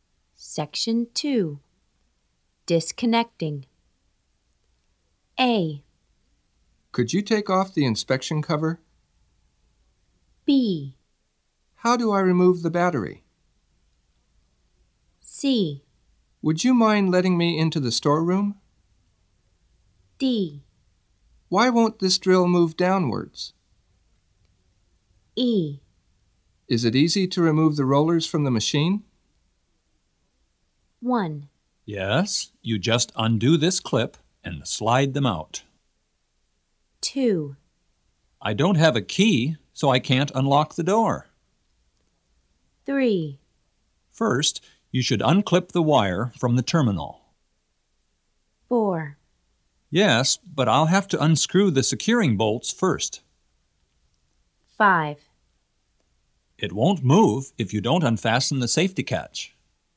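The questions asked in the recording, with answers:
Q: Yes, you just undo this clip and slide them out.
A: E: Is it easy to remove the rollers from the machine?

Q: I don't have a key, so I can't unlock the door.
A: C: Would you mind letting me into the storeroom?

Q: First, you should unclip the wire from the terminal.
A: B: How do I remove the battery?

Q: Yes, but I'll have to unscrew the securing bolts first.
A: A: Could you take off the inspection cover?

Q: It won't move if you don't unfasten the safety catch.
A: D: Why won't this drill move downwards?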